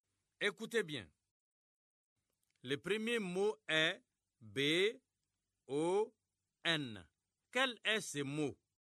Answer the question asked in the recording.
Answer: J'espère que vous avez trouvé bon.